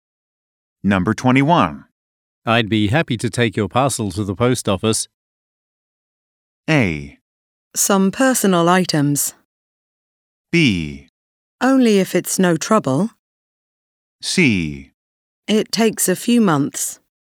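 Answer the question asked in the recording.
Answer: B: Only if it's no trouble.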